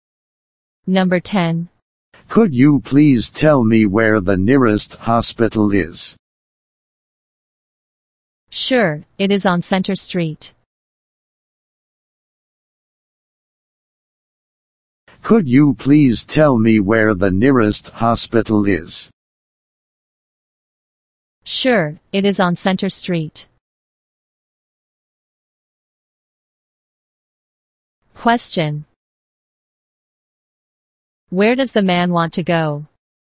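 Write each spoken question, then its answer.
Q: Where does the man want to go?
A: To the nearest hospital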